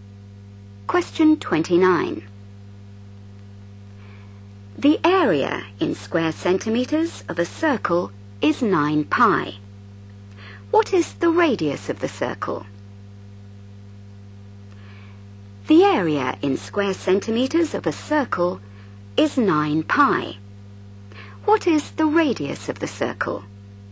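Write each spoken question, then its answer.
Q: What is the radius of the circle?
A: 3 cm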